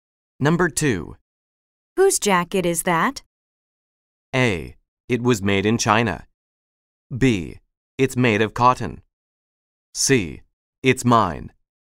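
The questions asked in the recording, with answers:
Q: Whose jacket is that?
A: C: It's mine.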